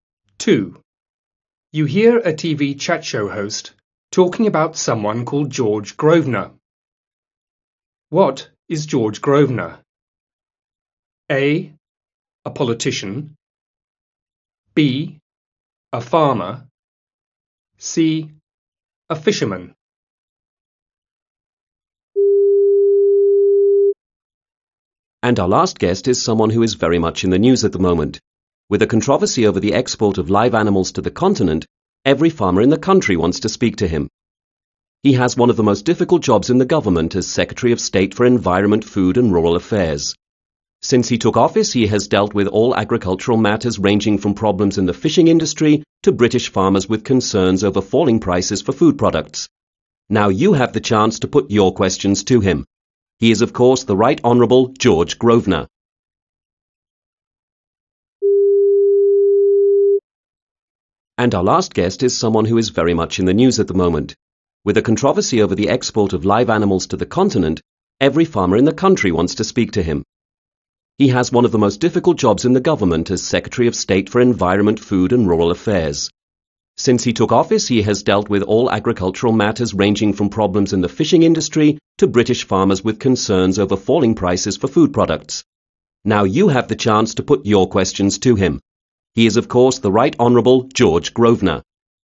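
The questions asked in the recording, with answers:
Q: What is George Grosvenor?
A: A: A politician.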